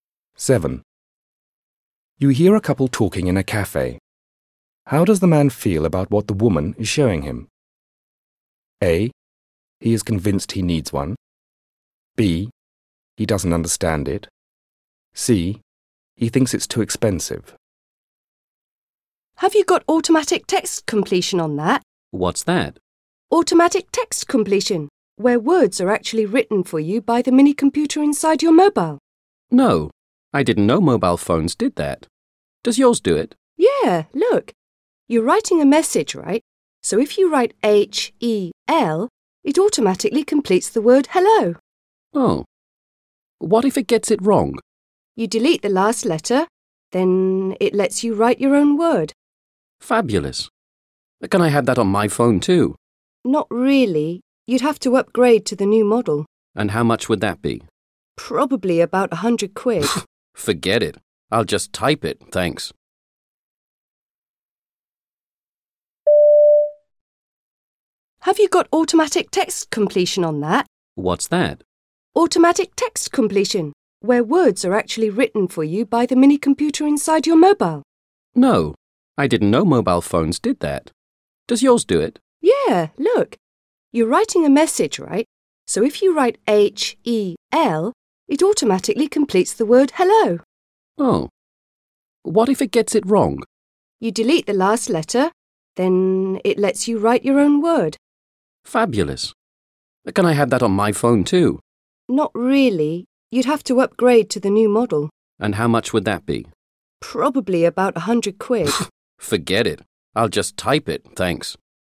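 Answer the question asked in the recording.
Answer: C: He thinks it's too expensive.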